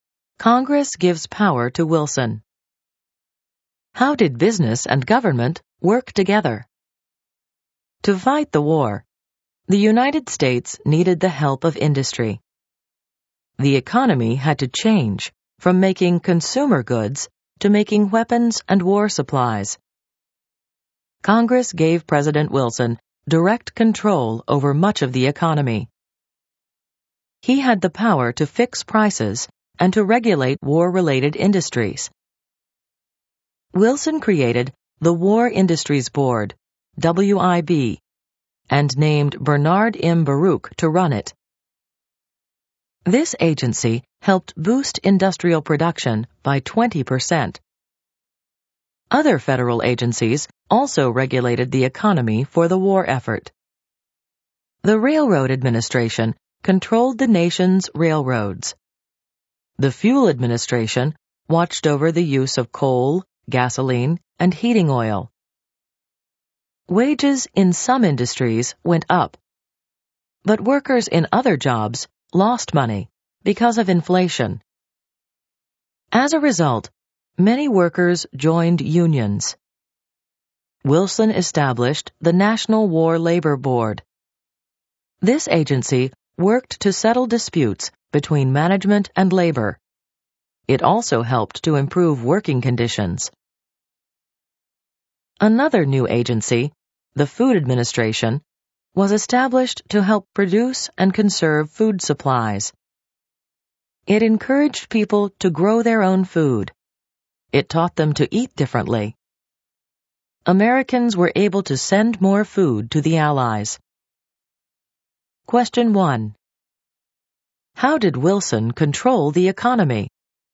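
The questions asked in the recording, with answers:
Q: How did Wilson control the economy?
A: Congress gave him power to fix prices and regulate war industries; he created agencies like the War Industries Board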